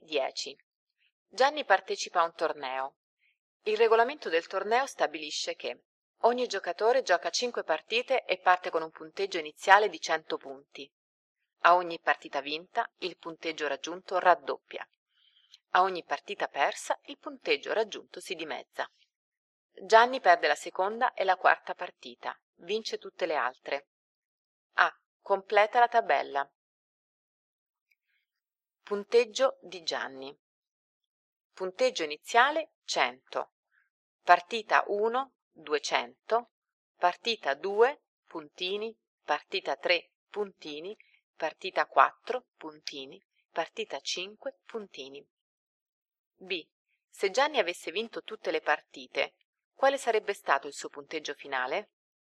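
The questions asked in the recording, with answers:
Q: Se Gianni avesse vinto tutte le partite, quale sarebbe stato il suo punteggio finale?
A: 3200 punti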